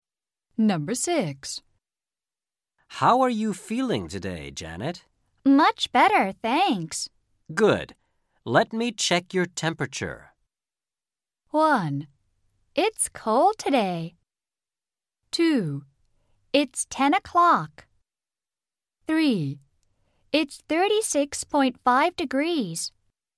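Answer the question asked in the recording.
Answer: 3: It's 36.5 degrees.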